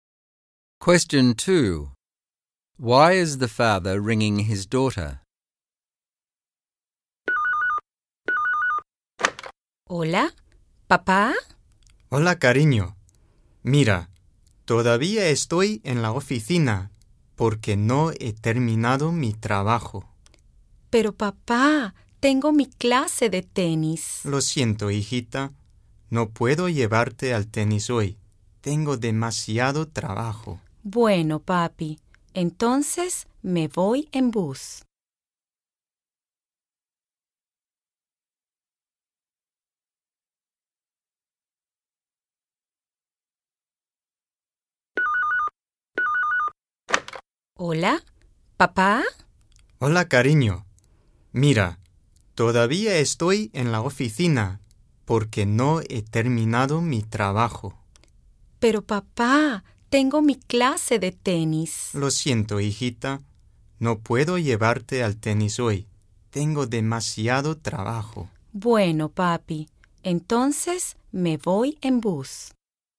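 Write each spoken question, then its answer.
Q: Why is the father ringing his daughter?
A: He is still at the office with too much work, so he can't take her to tennis today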